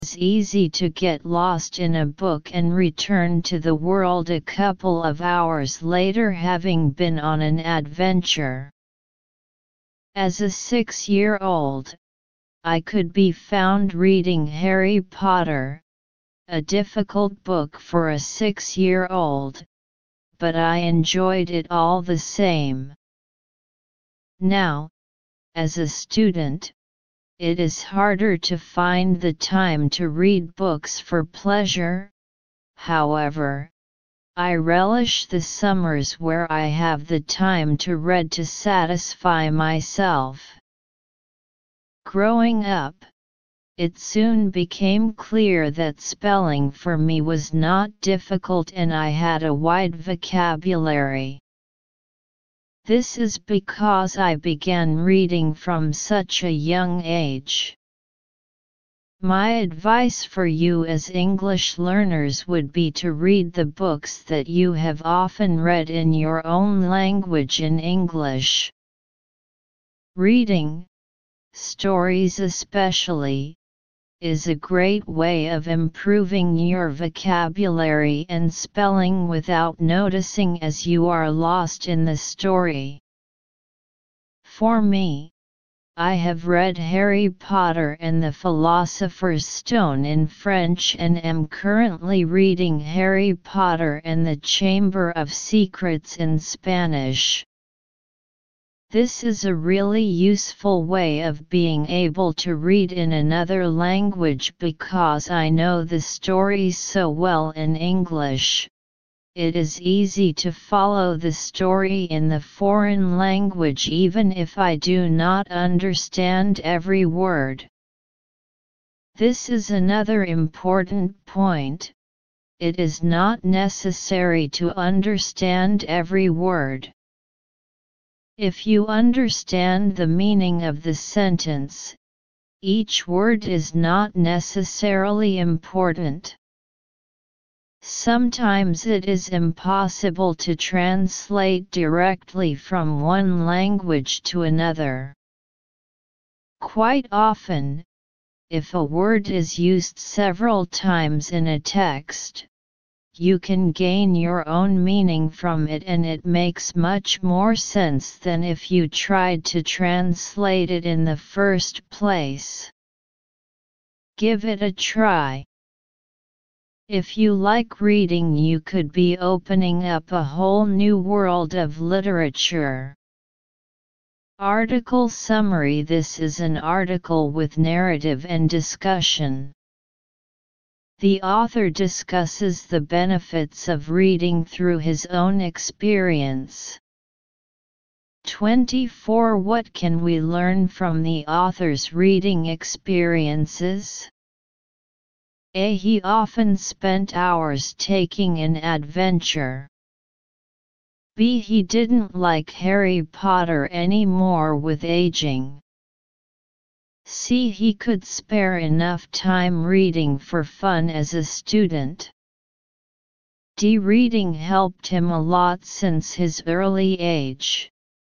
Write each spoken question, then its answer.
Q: What can we learn from the author's reading experiences?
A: Analysis. Choose D.